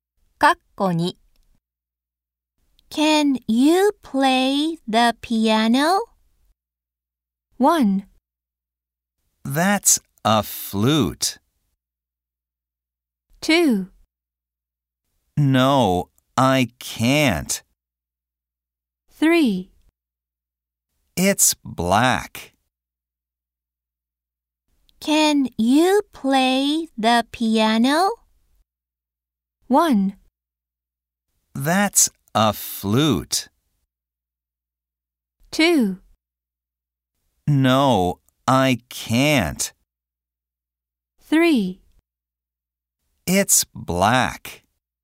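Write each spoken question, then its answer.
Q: Can you play the piano?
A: 2: No, I can't.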